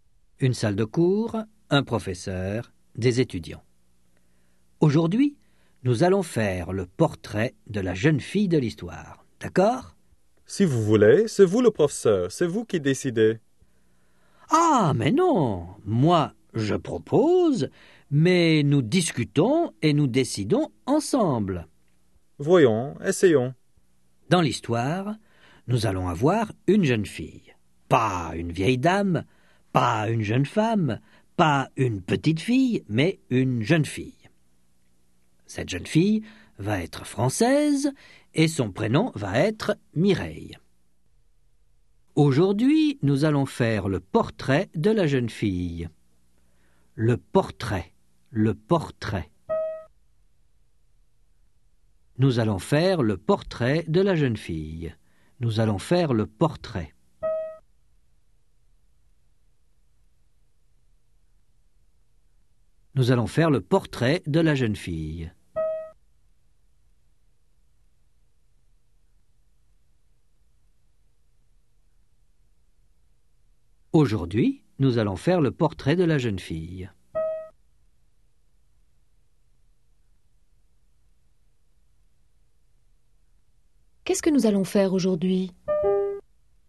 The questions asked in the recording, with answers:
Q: Qu'est-ce que nous allons faire aujourd'hui?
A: Le portrait de la jeune fille de l'histoire.